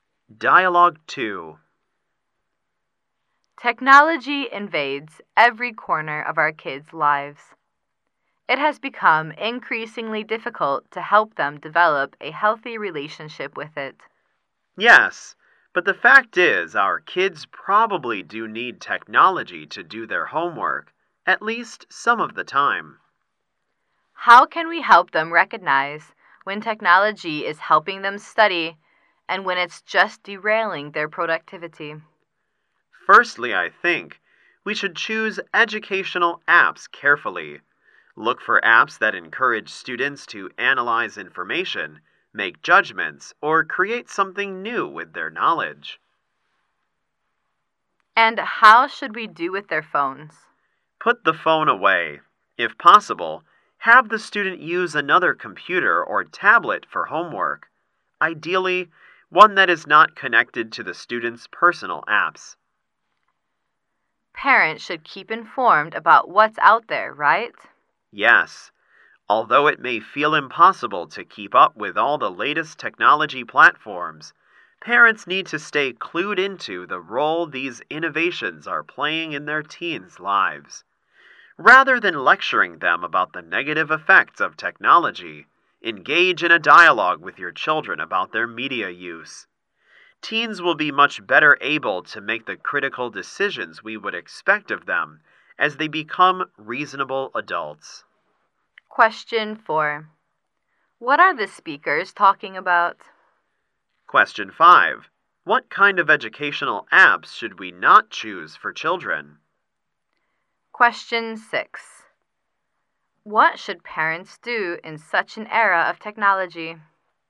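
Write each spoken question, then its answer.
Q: What are the speakers talking about?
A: Helping kids develop a healthy relationship with technology

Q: What should parents do in such an era of technology?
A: Keep informed about technology and talk with their children about their media use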